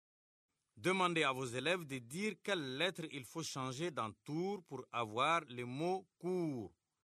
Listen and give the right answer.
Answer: Monsieur, j'efface le T et j'écris la lettre C.